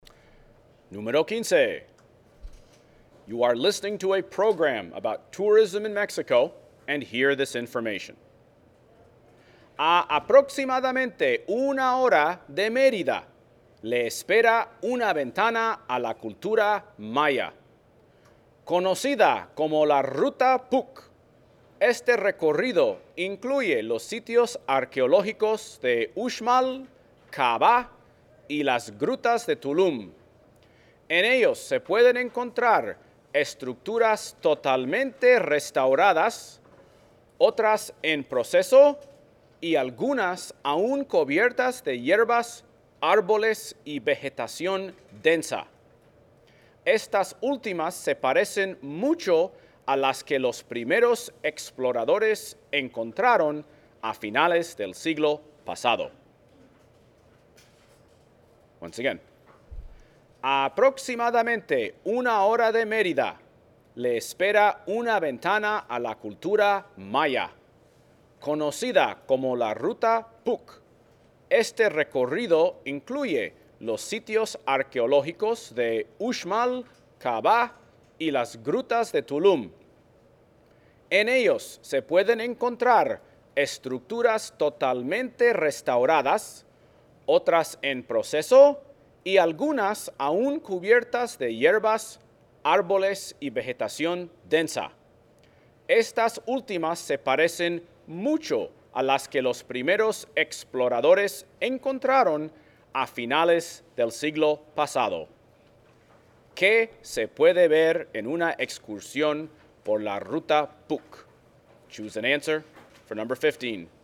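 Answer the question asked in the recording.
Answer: Sitios arqueológicos mayas: estructuras restauradas, otras en proceso y otras aún cubiertas de vegetación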